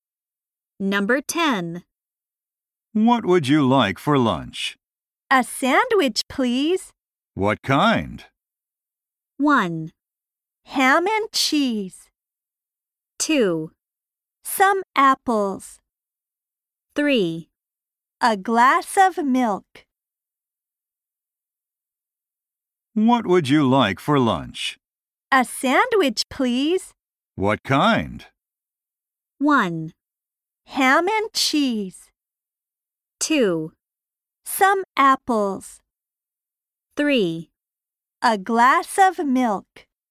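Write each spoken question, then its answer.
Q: What kind?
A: 1: Ham and cheese.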